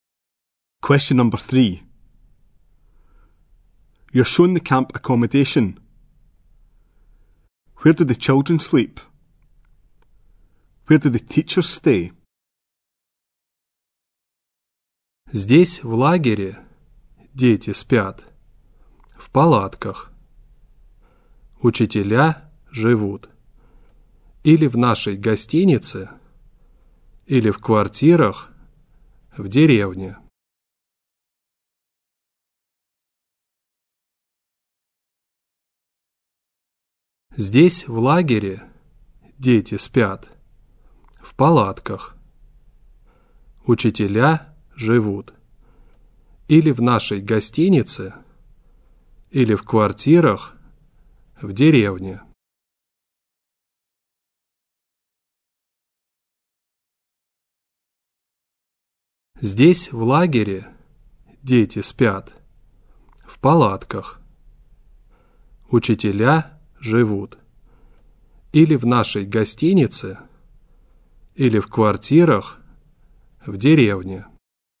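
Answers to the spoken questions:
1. In tents
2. In the hotel or in flats in the village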